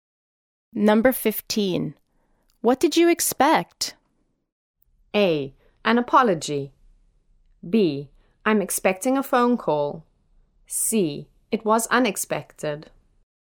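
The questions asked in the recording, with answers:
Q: What did you expect?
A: A: An apology.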